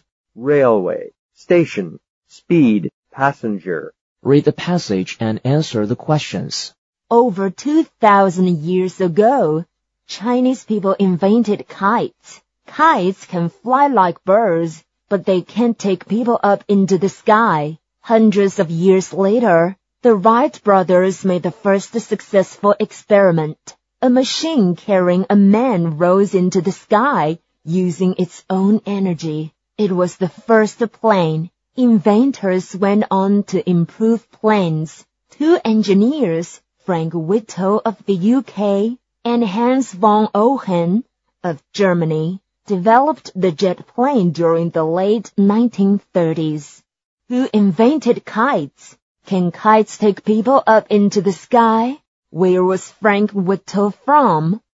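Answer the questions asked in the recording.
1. Chinese people
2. No, they can't
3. The UK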